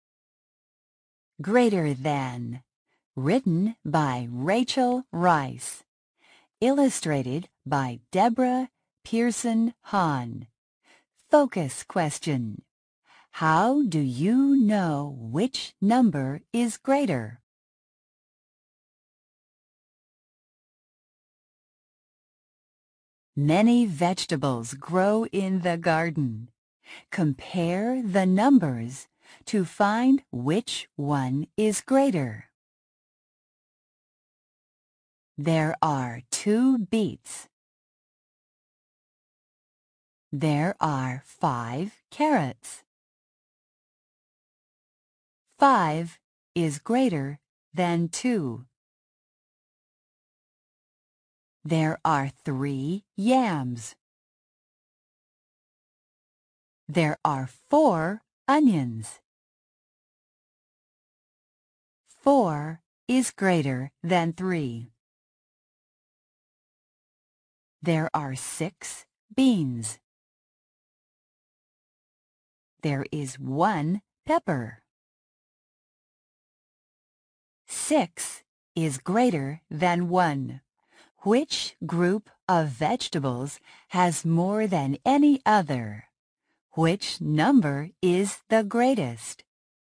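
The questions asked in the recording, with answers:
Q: Which group of vegetables has more than any other?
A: The beans (six beans)

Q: Which number is the greatest?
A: Six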